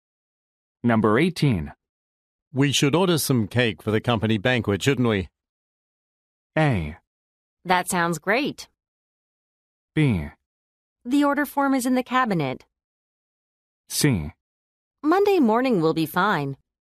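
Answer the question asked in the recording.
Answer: A: That sounds great.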